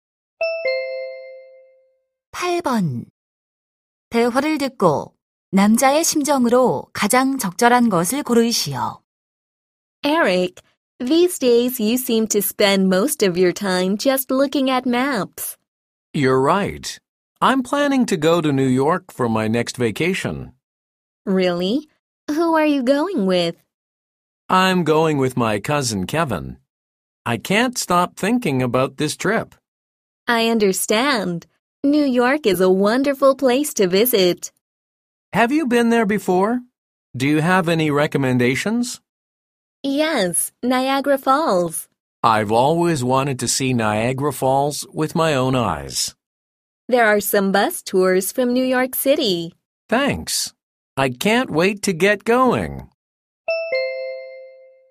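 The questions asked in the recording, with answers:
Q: 대화를 듣고 남자의 심정으로 가장 적절한 것을 고르시오.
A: 들뜬, 기대에 찬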